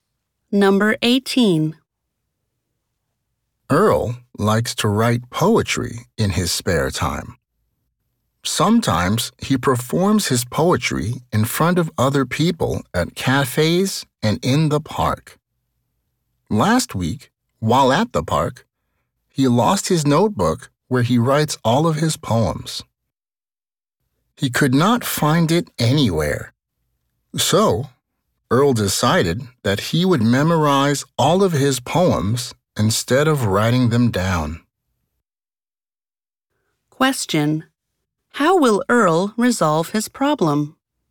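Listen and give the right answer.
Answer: He will memorize all of his poems instead of writing them down.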